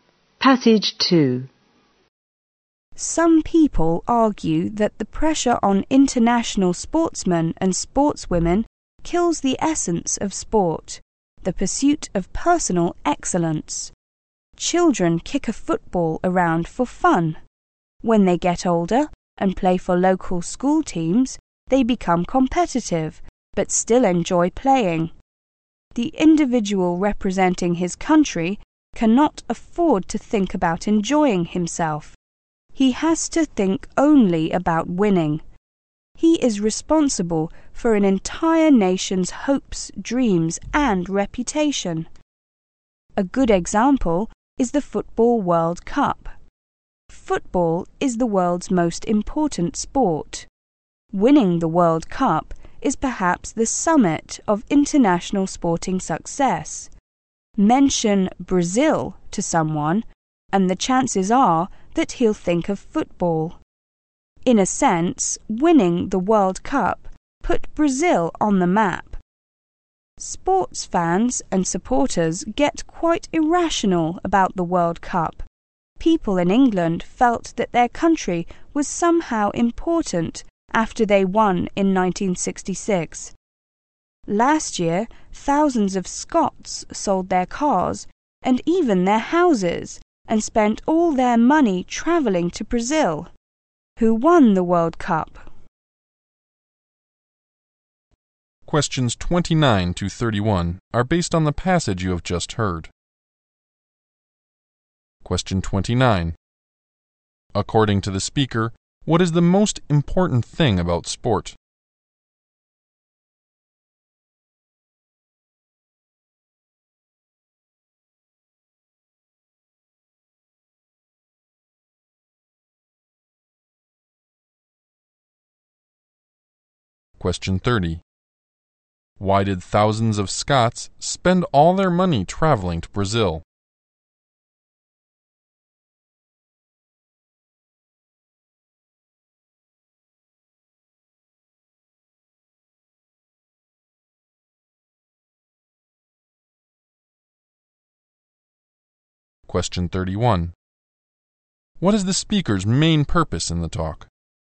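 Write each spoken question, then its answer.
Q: According to the speaker, what is the most important thing about sport?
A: The pursuit of personal excellence

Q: Why did thousands of Scots spend all their money traveling to Brazil?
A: To watch and support their team at the World Cup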